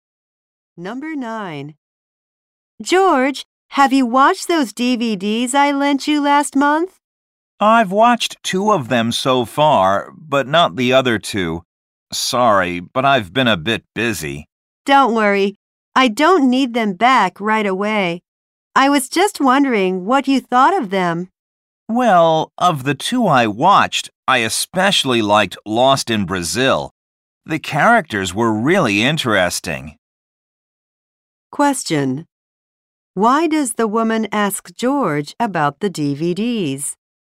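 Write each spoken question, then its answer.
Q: Why does the woman ask George about the DVDs?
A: She wants to know what he thought of them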